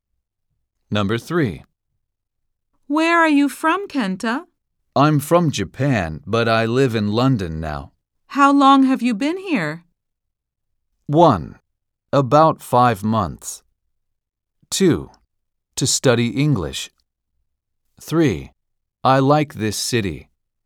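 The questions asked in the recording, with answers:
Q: How long have you been here?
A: 1: About 5 months.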